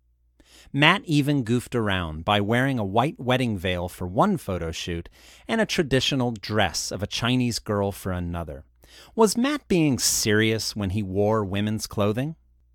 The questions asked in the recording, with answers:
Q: Was Matt being serious when he wore women's clothing?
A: No, he was goofing around.